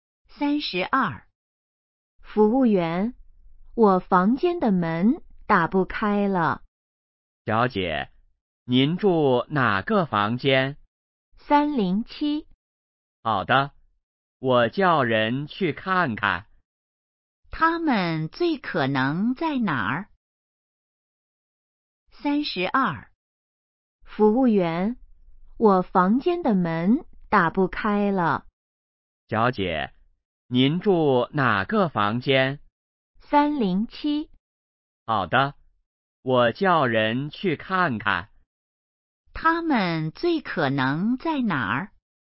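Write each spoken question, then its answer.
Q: 他们最可能在哪儿?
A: 宾馆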